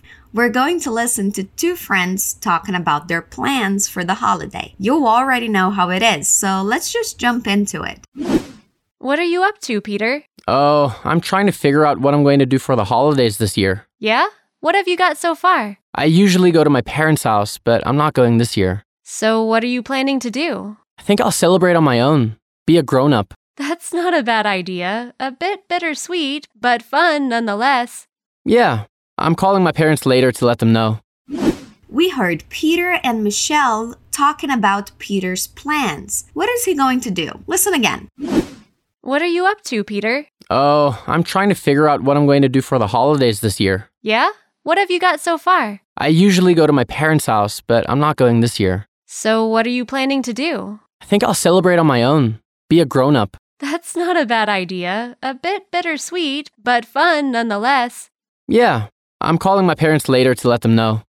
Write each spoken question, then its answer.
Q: What is he going to do?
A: So he'll celebrate the holidays by himself, being an adult.